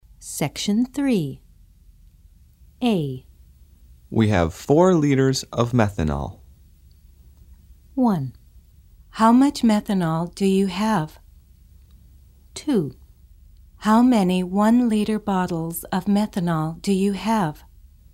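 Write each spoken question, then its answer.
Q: How much methanol do you have?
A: 4 liters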